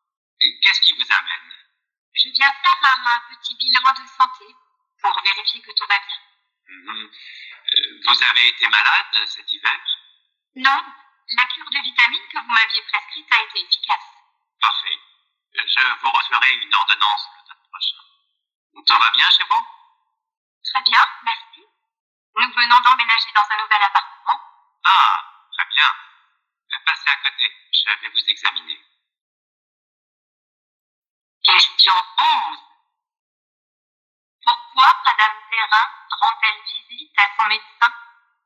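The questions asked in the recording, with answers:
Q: Pourquoi Madame Perrin rend-elle visite à son médecin?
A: Pour faire un petit bilan de santé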